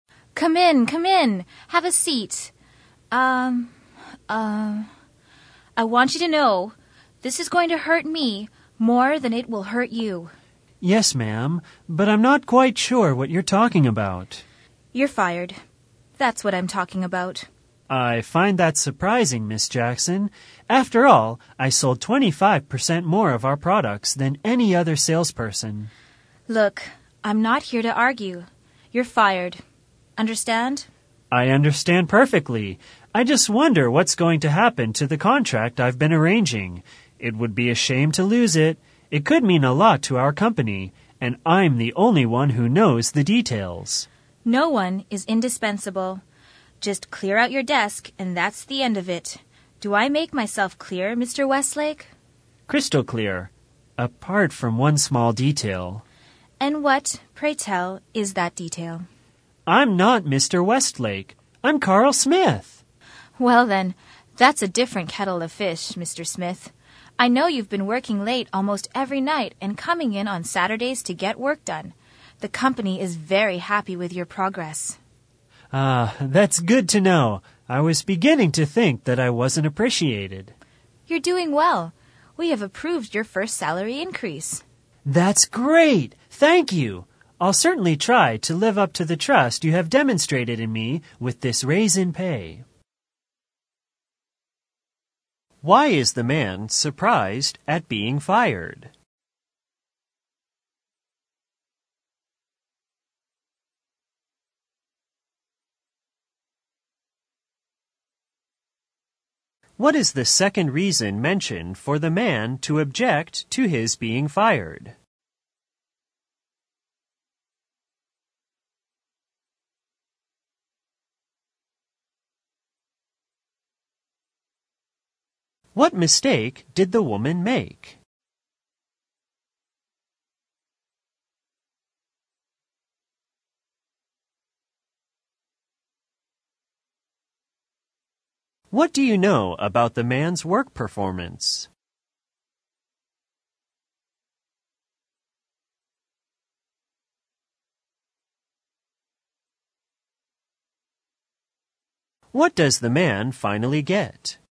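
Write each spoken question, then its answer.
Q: Why is the man surprised at being fired?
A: He sold 25% more products than any other salesperson.

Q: What is the second reason mentioned for the man to object to his being fired?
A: He is the only one who knows the details of the contract he has been arranging.

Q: What mistake did the woman make?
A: She mistook him for Mr. Westlake.

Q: What do you know about the man's work performance?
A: He works late almost every night and on Saturdays, and the company is happy with his progress.

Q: What does the man finally get?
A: A salary increase.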